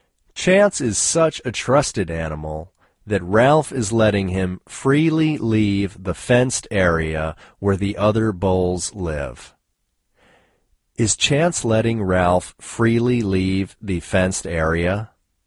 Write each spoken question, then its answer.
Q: Is Chance letting Ralph freely leave the fenced area?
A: No, Chance isn't letting Ralph freely leave the fenced area.